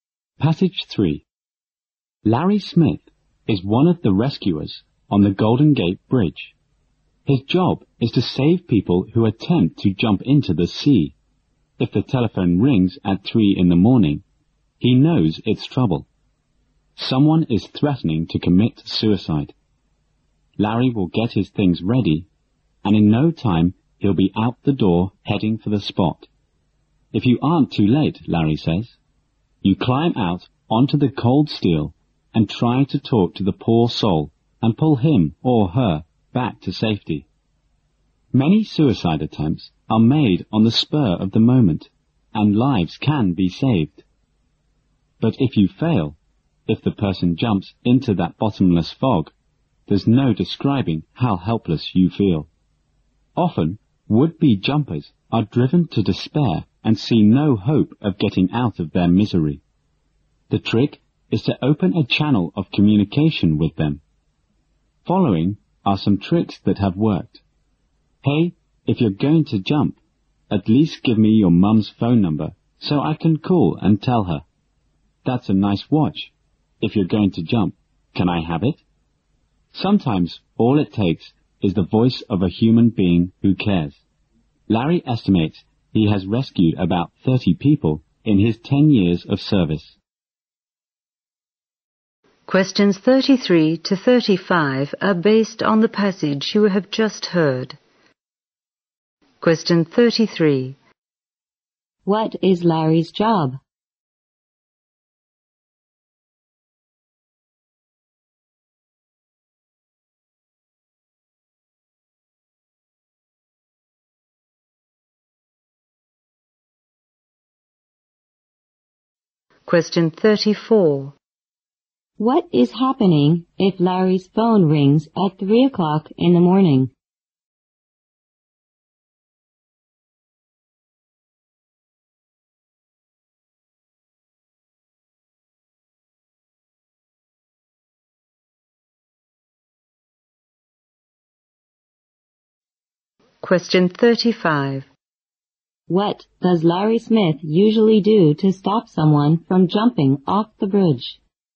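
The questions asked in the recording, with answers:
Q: What is Larry's job?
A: Rescuing people who try to jump off the Golden Gate Bridge

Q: What is happening if Larry's phone rings at 3 o'clock in the morning?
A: Someone is threatening to commit suicide

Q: What does Larry Smith usually do to stop someone from jumping off the bridge?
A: He talks to them to open a channel of communication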